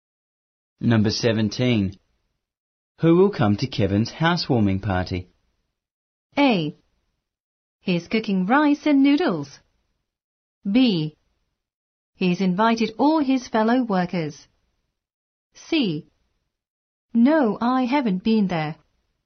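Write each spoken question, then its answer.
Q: Who will come to Kevin's housewarming party?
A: B: He's invited all his fellow workers.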